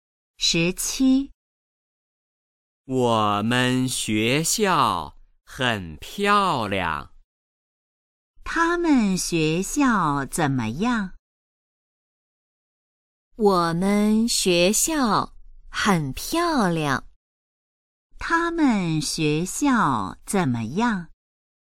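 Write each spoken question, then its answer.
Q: 他们学校怎么样?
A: 很漂亮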